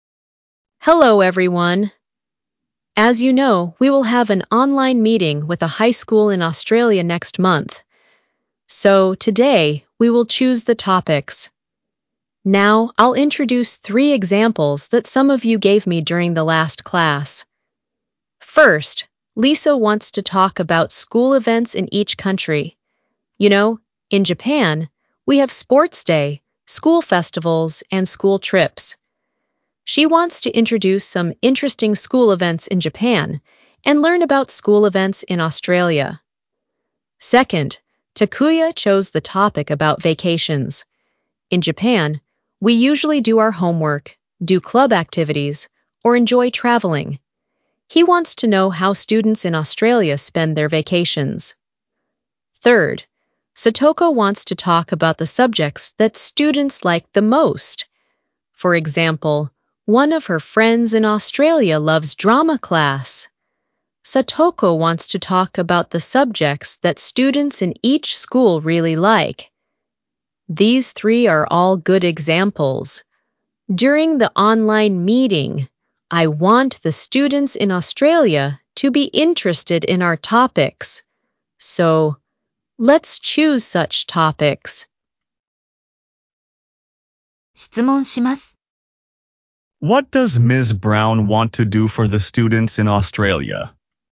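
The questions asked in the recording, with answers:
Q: What does Ms. Brown want to do for the students in Australia?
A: She wants to make them interested in the students' topics during the online meeting.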